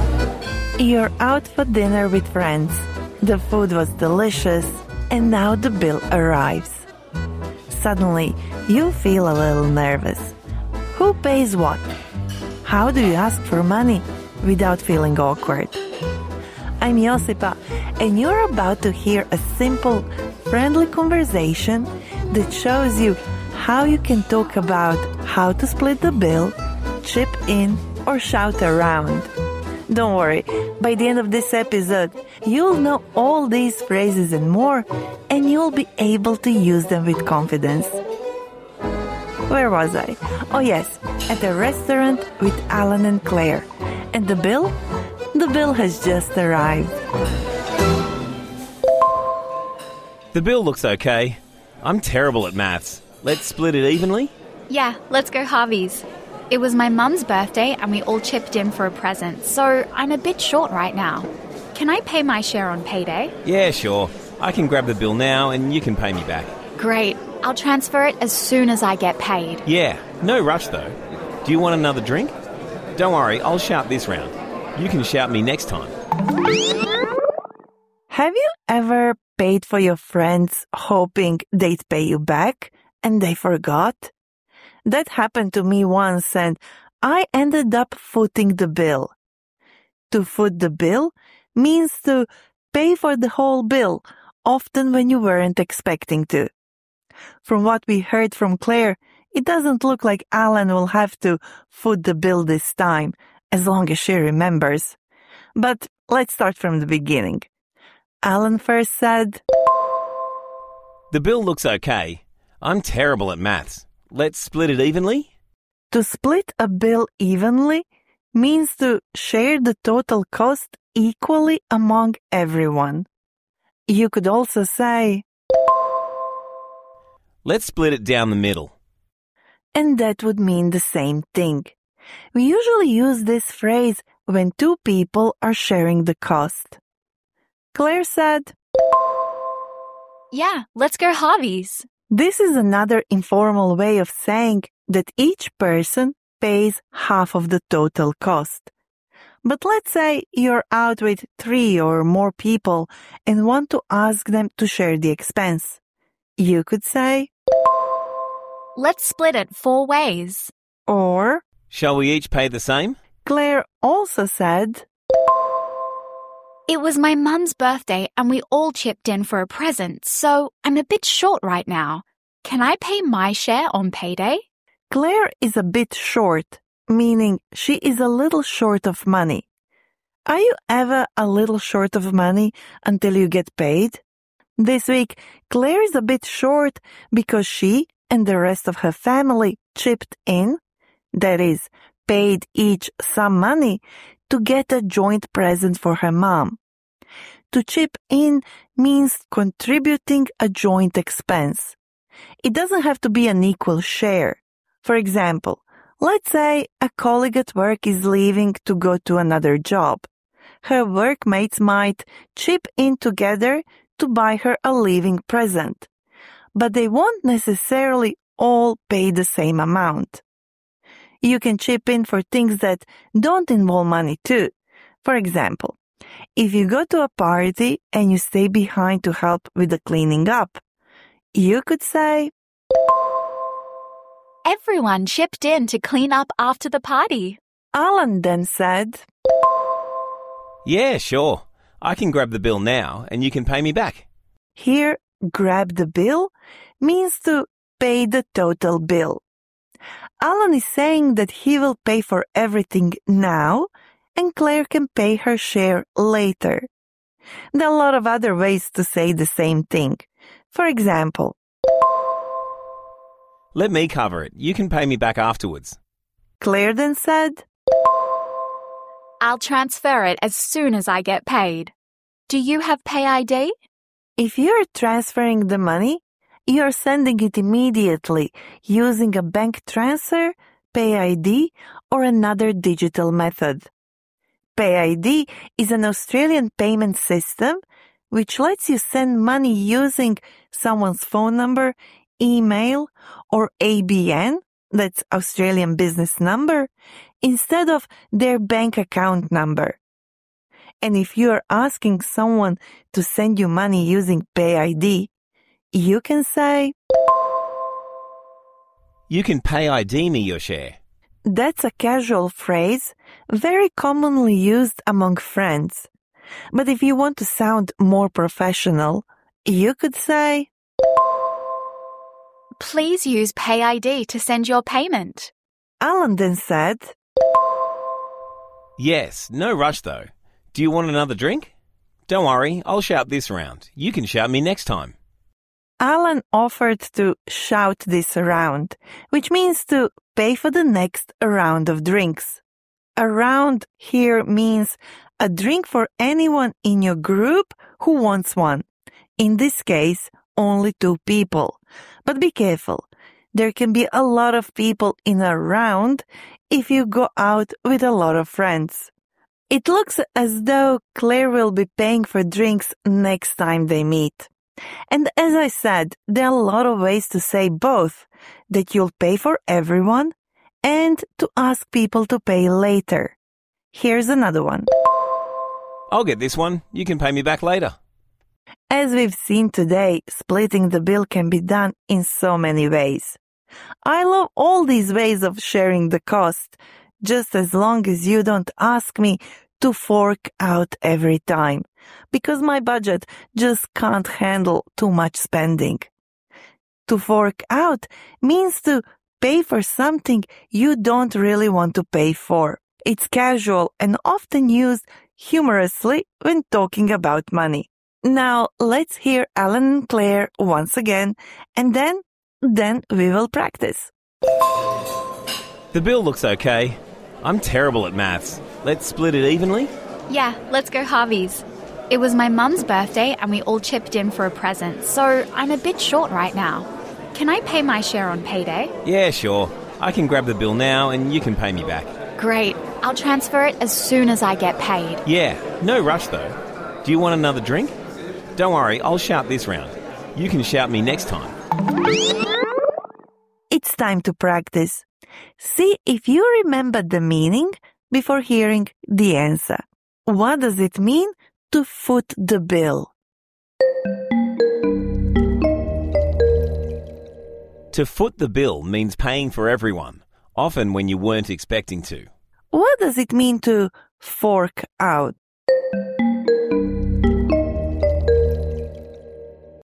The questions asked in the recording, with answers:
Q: What does it mean to fork out?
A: To fork out means to pay for something you don't really want to pay for.